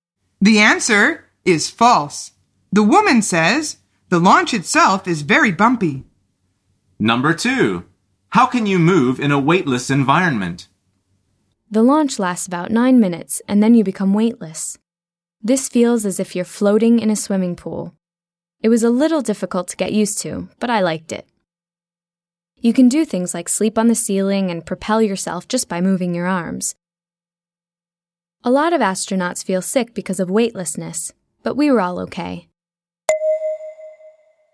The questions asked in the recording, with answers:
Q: How can you move in a weightless environment?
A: The answer is with your arms.